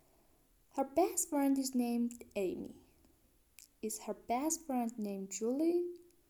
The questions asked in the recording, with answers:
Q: Is her best friend named Julie?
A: No, her best friend is named Amy.